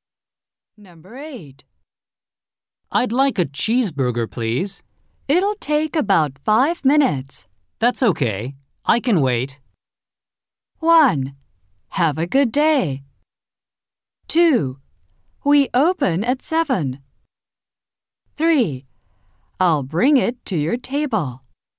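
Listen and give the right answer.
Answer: 3: I'll bring it to your table.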